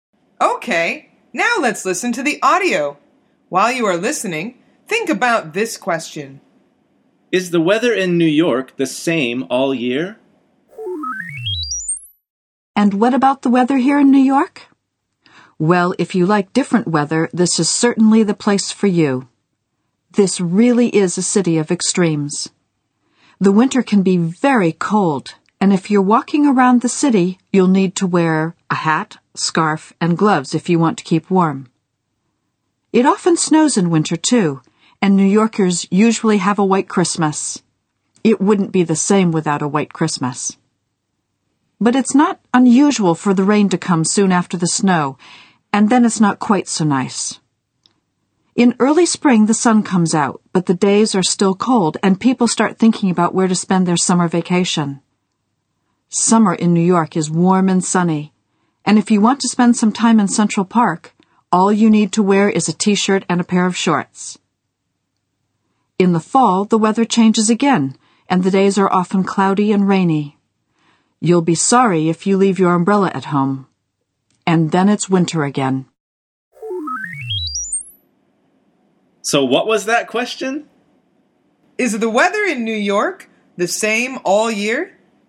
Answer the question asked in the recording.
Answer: The answer is no. It changes a lot.